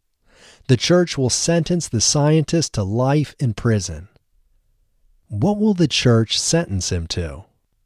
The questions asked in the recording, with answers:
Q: What will the church sentence him to?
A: The church will sentence him to life in prison.